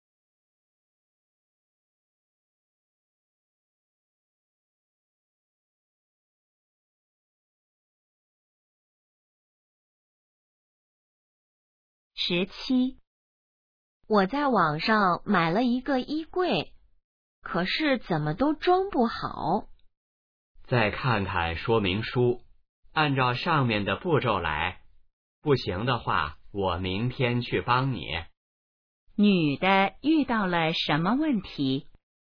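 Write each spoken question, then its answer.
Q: 女的遇到了什么问题?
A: 衣柜装不好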